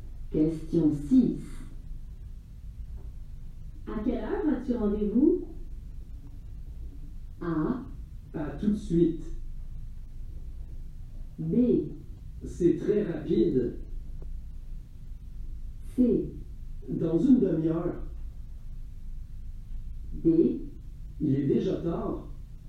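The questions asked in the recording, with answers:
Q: À quelle heure as-tu rendez-vous?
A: C: Dans une demi-heure.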